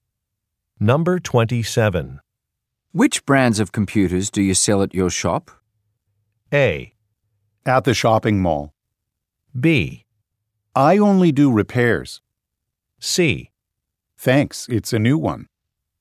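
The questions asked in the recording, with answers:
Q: Which brands of computers do you sell at your shop?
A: B: I only do repairs.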